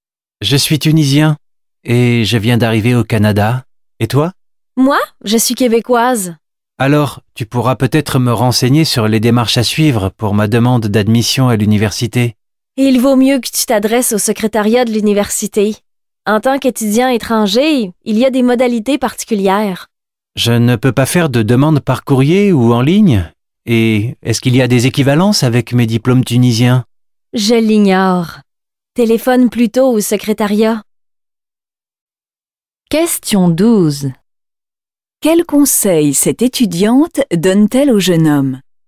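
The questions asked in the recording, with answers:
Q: Quel conseil cette étudiante donne-t-elle au jeune homme?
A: De s'adresser (téléphoner) au secrétariat de l'université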